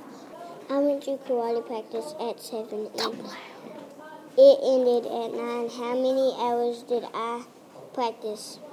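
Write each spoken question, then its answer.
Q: How many hours did I practice?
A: 2 hours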